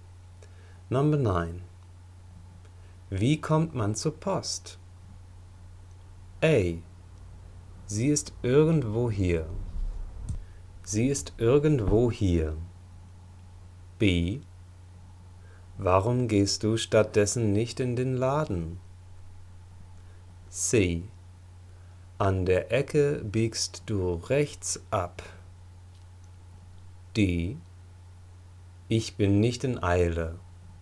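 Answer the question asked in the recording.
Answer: C: An der Ecke biegst du rechts ab.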